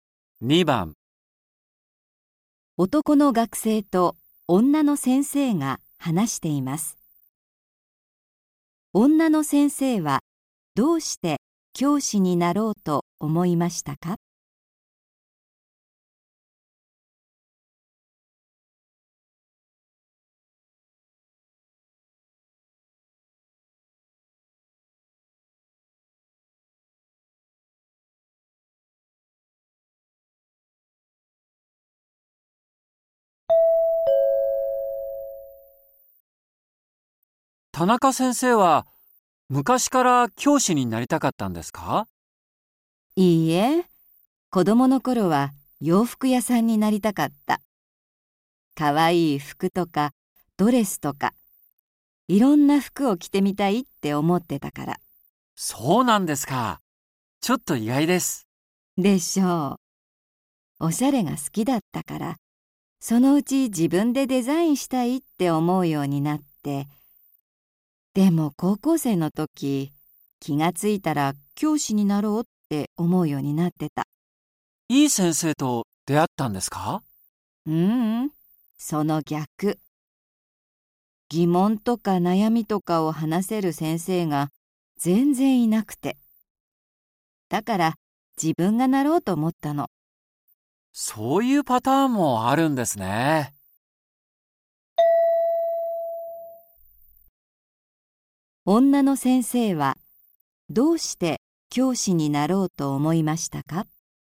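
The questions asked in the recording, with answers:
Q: 女の先生はどうして教師になろうと思いましたか?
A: 高校の時、疑問や悩みを話せる先生が全然いなかったから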